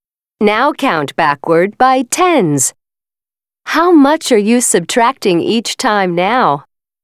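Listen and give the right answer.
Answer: 10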